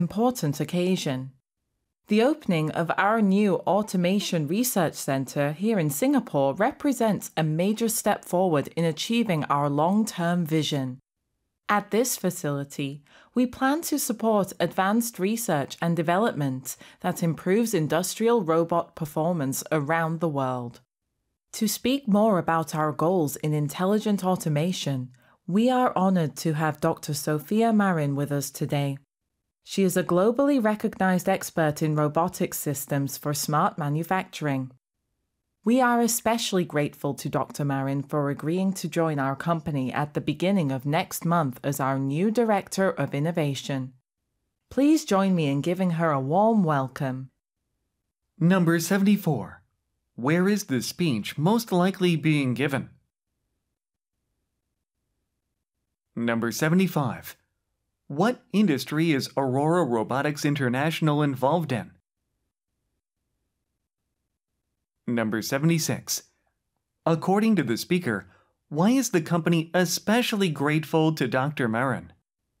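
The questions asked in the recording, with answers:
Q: Where is the speech most likely being given?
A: At the opening of a new Automation Research Centre in Singapore

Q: What industry is Aurora Robotics International involved in?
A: Industrial robotics / intelligent automation

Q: According to the speaker, why is the company especially grateful to Dr. Marin?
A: She agreed to join the company next month as Director of Innovation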